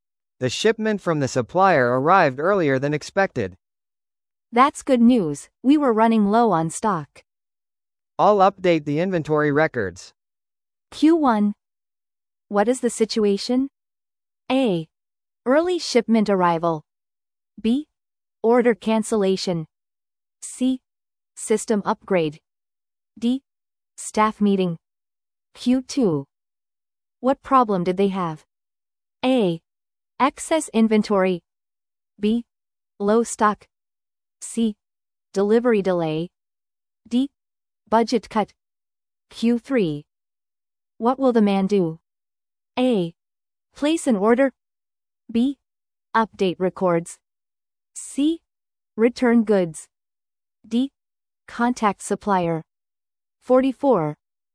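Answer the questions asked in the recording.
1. A: Early shipment arrival.
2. B: Low stock.
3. B: Update records.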